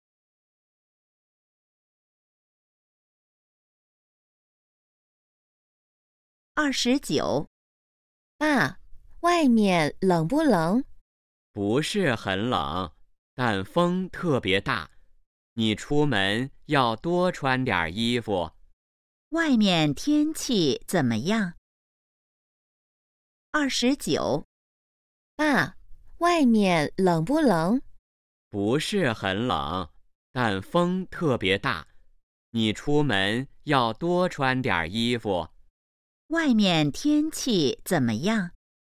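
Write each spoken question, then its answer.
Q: 外面天气怎么样?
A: 不是很冷,但风特别大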